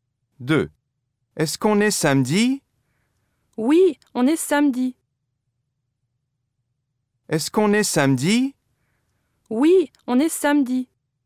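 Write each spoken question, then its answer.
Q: Est-ce qu'on est samedi?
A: oui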